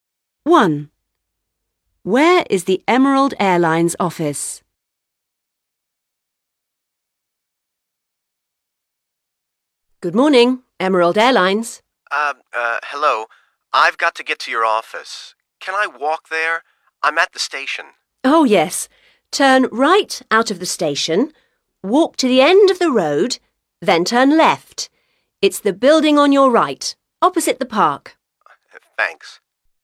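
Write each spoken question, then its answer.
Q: Where is the Emerald Airlines office?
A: Opposite the park (turn right out of the station, walk to the end of the road, turn left; on the right)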